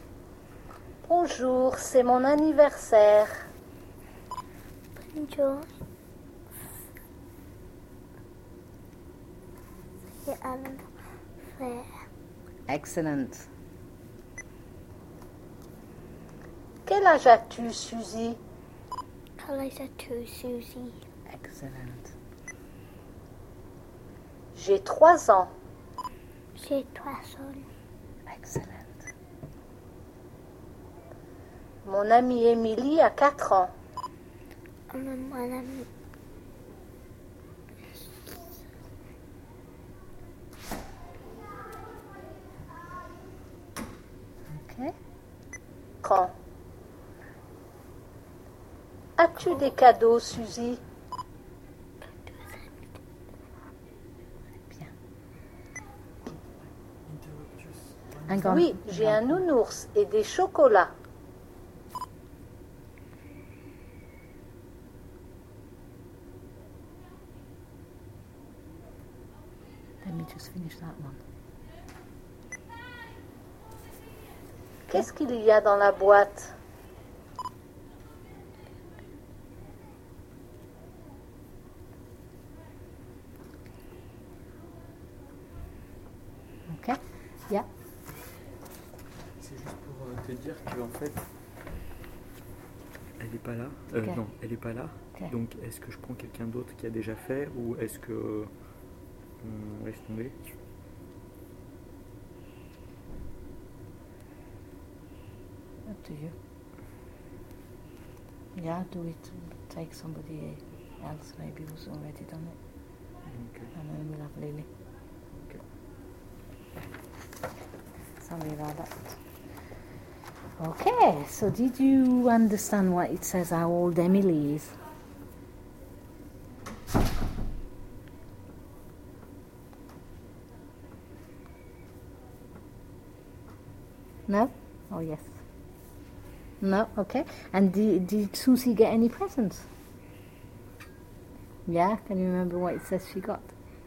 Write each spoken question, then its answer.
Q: Yeah, can you remember what it says she got?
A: A nounours et des chocolats.